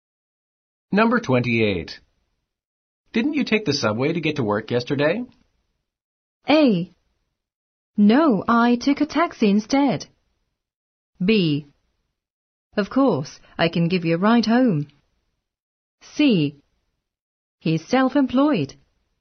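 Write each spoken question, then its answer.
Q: Didn't you take the subway to get to work yesterday?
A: A: No, I took a taxi instead.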